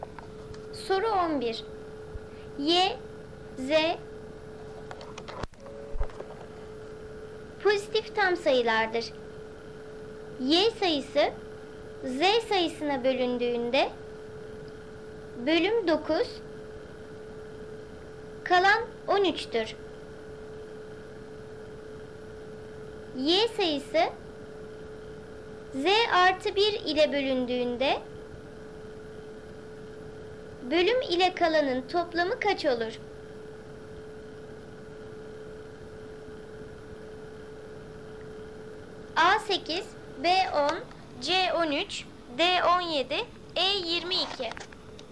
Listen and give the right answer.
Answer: Doğru cevap C 13.